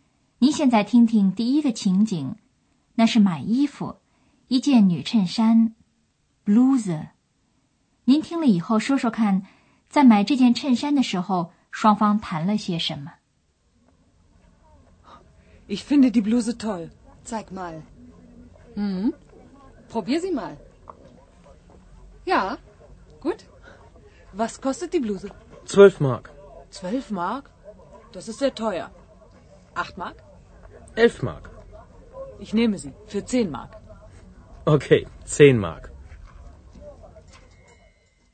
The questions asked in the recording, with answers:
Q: 您听了以后说说看,在买这件衬衫的时候,双方谈了些什么?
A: 这是跳蚤市场上的典型情景,讨价还价。